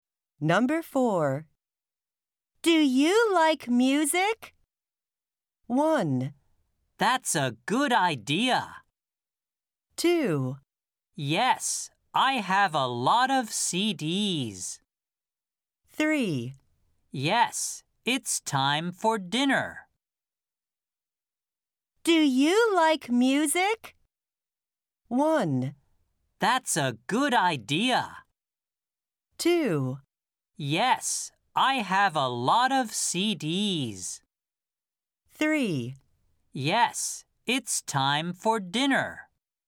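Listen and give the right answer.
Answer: 2: Yes, I have a lot of CDs.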